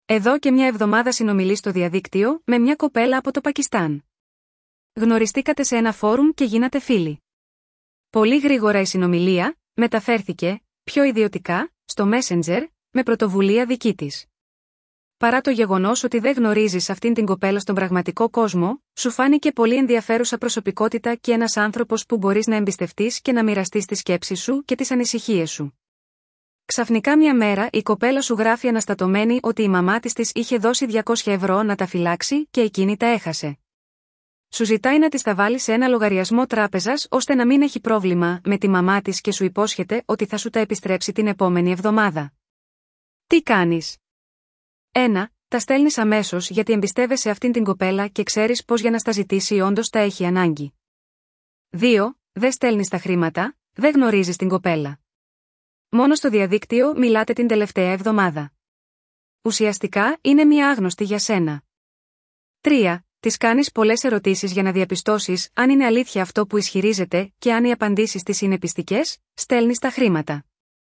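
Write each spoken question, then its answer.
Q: Τι κάνεις?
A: 2: Δεν στέλνεις τα χρήματα, δεν γνωρίζεις την κοπέλα.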